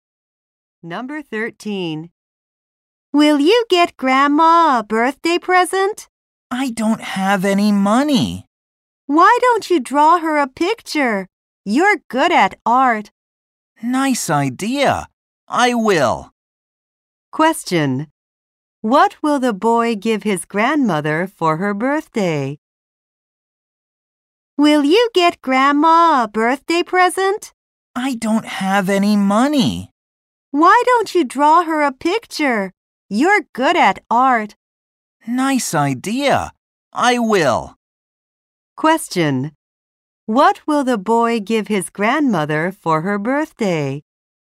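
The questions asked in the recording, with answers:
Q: What will the boy give his grandmother for her birthday?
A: A picture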